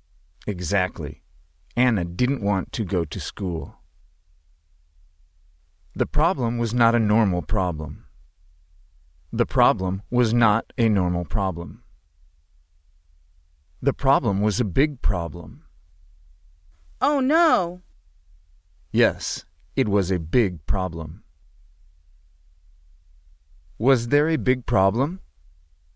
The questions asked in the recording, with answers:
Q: Was there a big problem?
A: Yes.